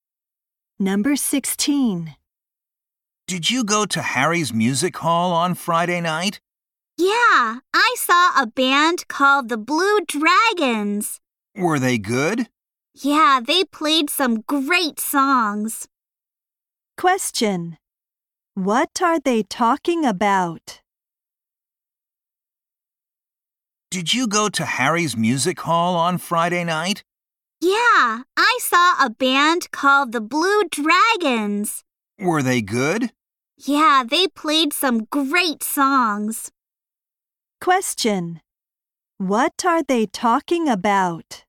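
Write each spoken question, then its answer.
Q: What are they talking about?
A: A band (the Blue Dragons) at Harry's Music Hall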